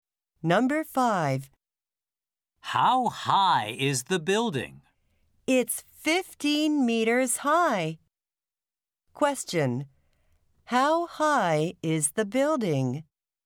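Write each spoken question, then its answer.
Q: How high is the building?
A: 15 meters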